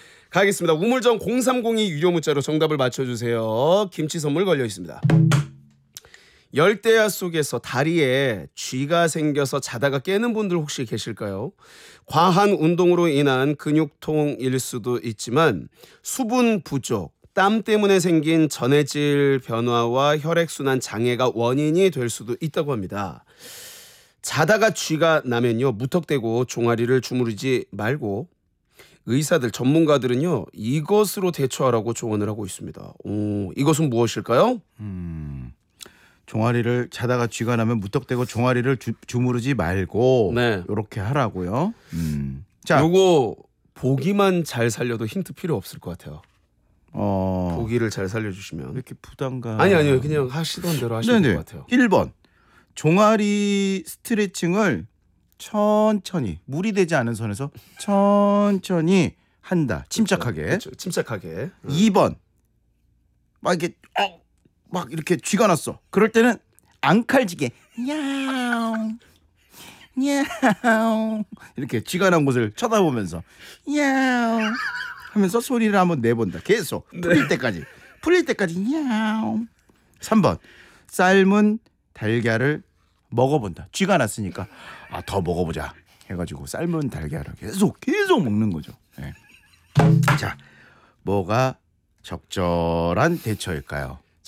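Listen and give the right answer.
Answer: 1번: 종아리 스트레칭을 천천히 무리되지 않은 선에서 천천히 한다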